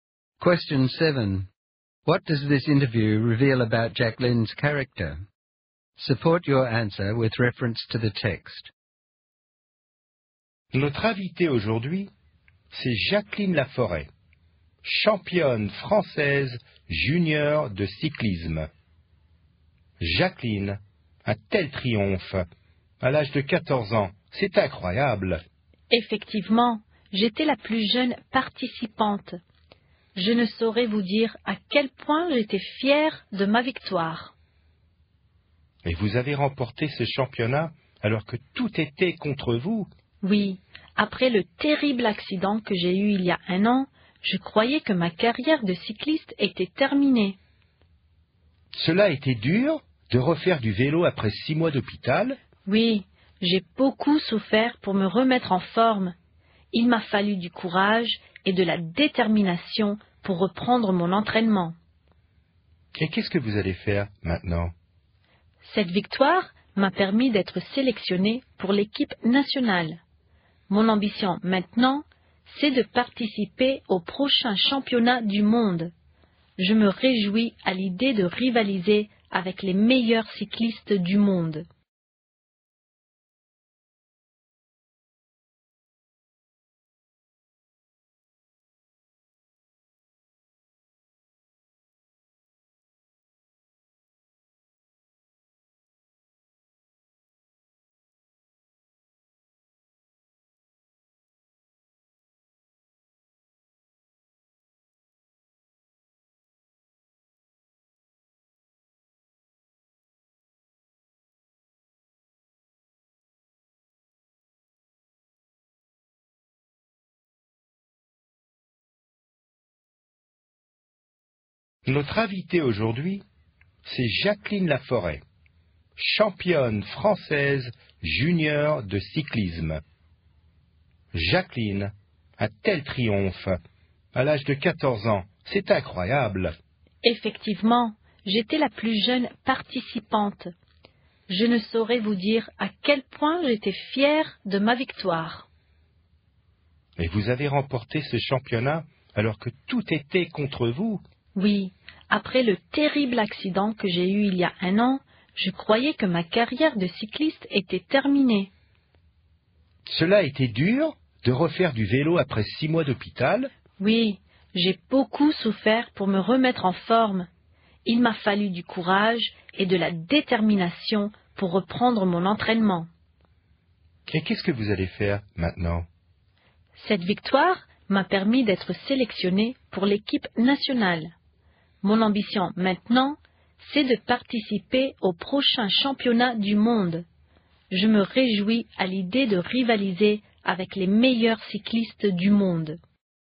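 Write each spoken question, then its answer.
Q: What does this interview reveal about Jack Lynn's character?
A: She is courageous, determined and ambitious: she recovered from a serious accident and 6 months in hospital to win the championship at 14, and she now wants to compete at the world championship.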